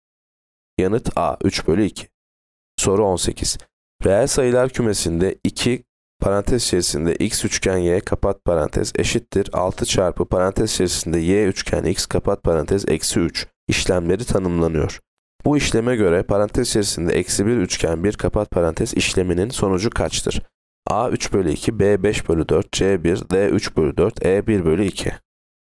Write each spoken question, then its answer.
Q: Bu işleme göre parantez içerisinde eksi 1 üçgen 1 kapat parantez işleminin sonucu kaçtır?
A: Yanıt D 3 bölü 4.